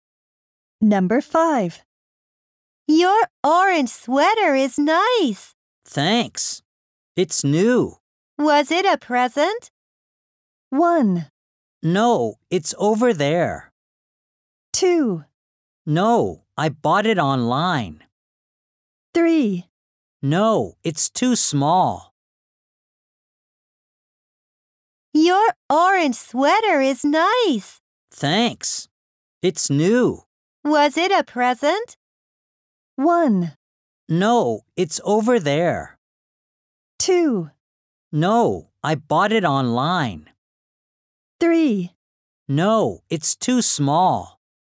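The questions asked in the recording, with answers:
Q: Was it a present?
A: 2: No, I bought it online.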